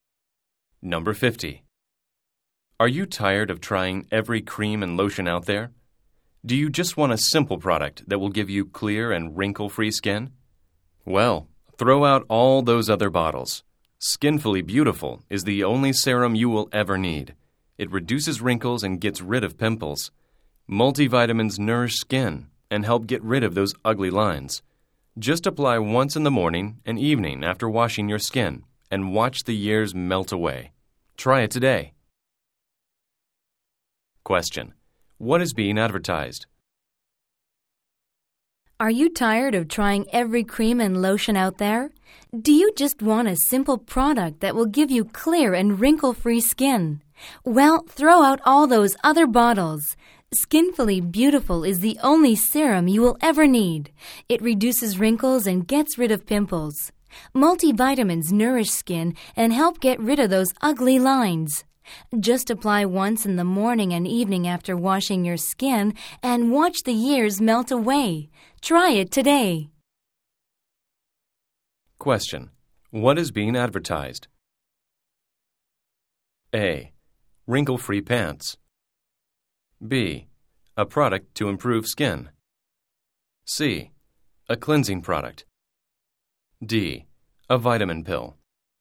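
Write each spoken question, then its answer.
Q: What is being advertised?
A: B: A product to improve skin.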